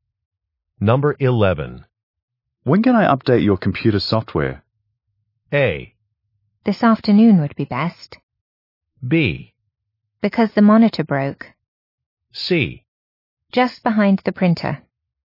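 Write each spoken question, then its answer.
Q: When can I update your computer software?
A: A: This afternoon would be best.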